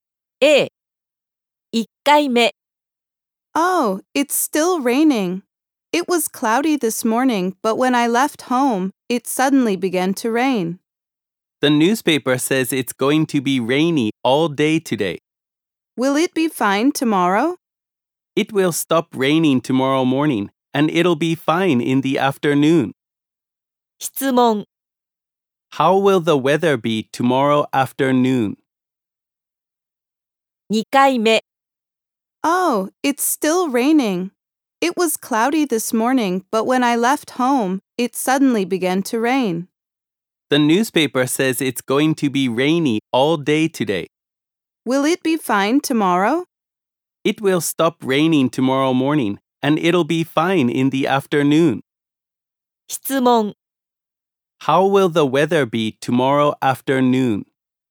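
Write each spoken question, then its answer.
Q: How will the weather be tomorrow afternoon?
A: It will be fine.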